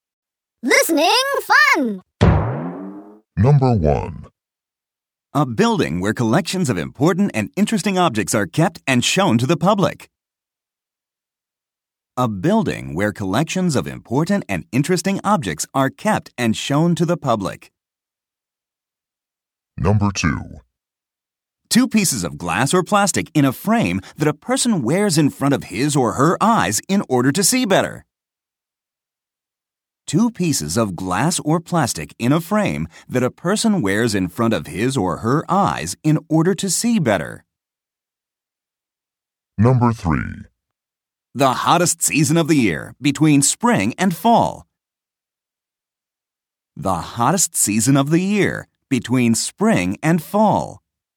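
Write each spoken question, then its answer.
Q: A building where collections of important and interesting objects are kept and shown to the public.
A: museum

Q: Two pieces of glass or plastic in a frame that a person wears in front of his or her eyes in order to see better.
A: glasses

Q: The hottest season of the year, between spring and fall.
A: summer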